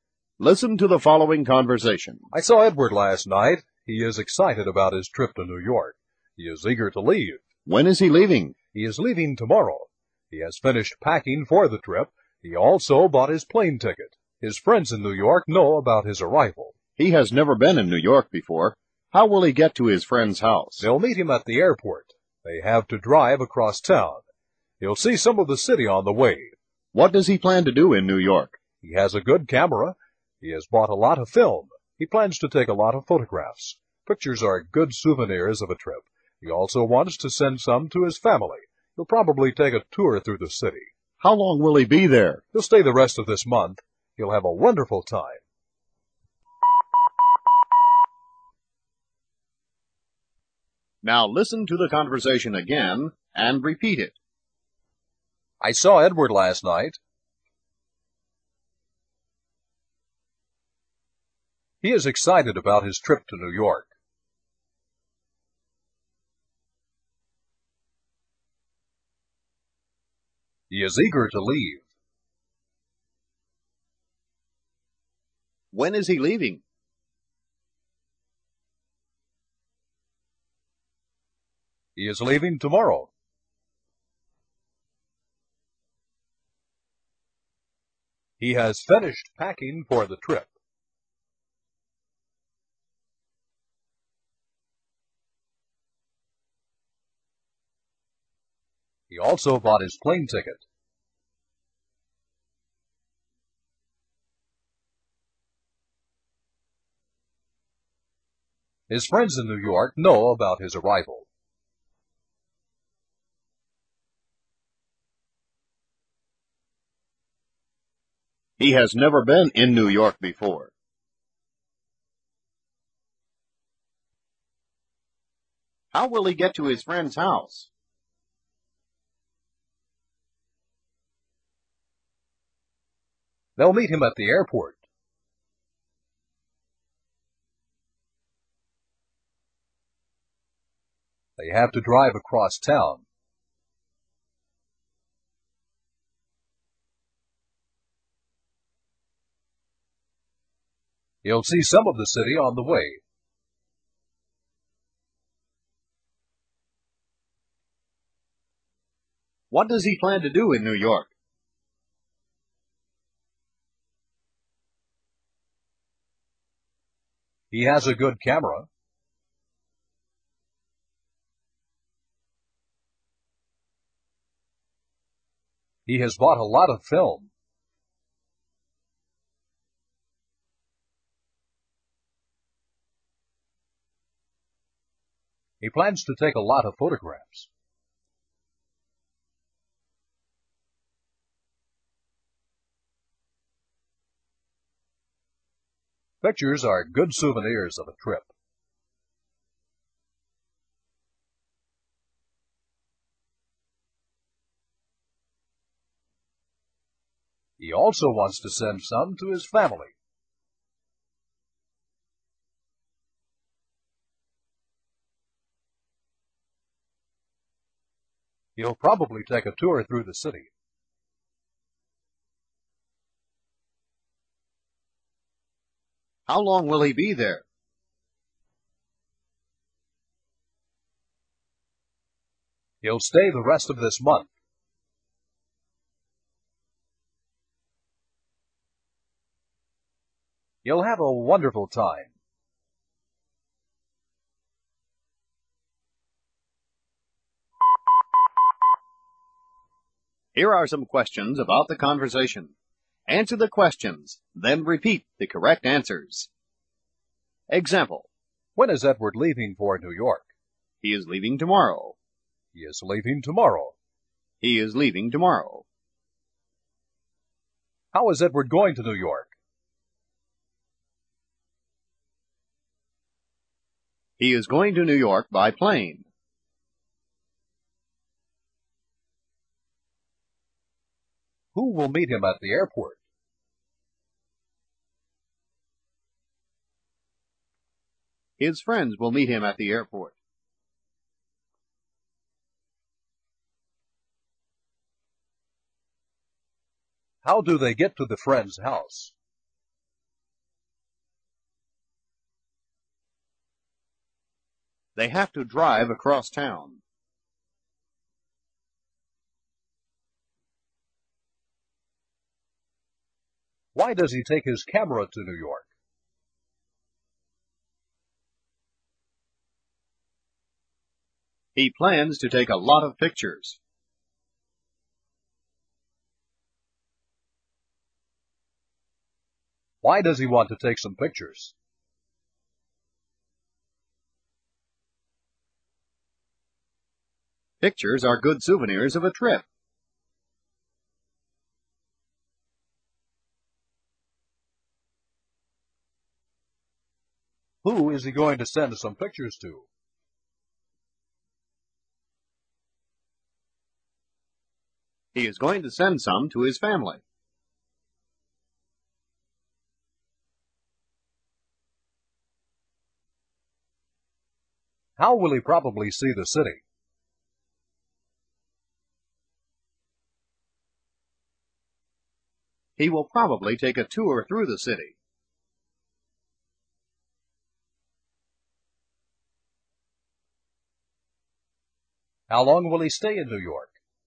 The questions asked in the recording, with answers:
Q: How is Edward going to New York?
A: He is going to New York by plane.

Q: Who will meet him at the airport?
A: His friends will meet him at the airport.

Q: How do they get to the friend's house?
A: They have to drive across town.

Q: Why does he take his camera to New York?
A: He plans to take a lot of pictures.

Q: Why does he want to take some pictures?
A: Pictures are good souvenirs of a trip.

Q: Who is he going to send some pictures to?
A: He is going to send some to his family.

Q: How will he probably see the city?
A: He will probably take a tour through the city.

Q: How long will he stay in New York?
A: He will stay the rest of the month.